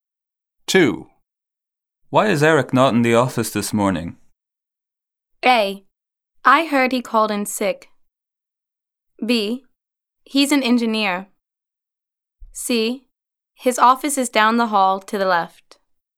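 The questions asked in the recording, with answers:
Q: Why is Eric not in the office this morning?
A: A: I heard he called in sick.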